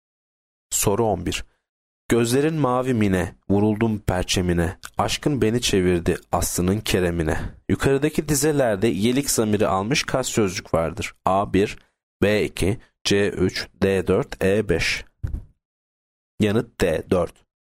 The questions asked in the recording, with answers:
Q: Yukarıdaki dizelerde yelik zamiri almış kaç sözcük vardır?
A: Yanıt D4.